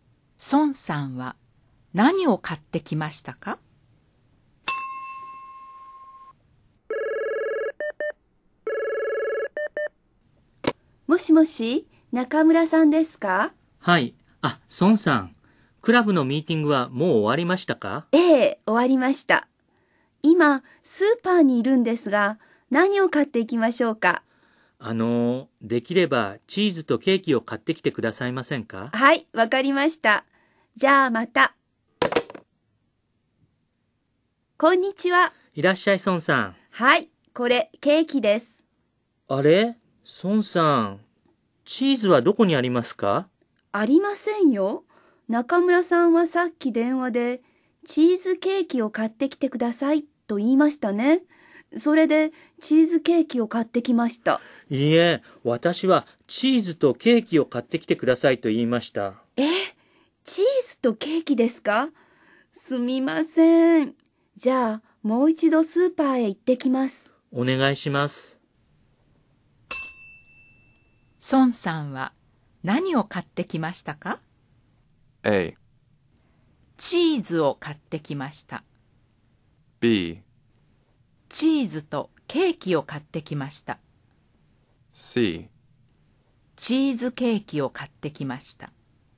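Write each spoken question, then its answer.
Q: 孫さんは何を買ってきましたか?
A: C: チーズケーキを買ってきました。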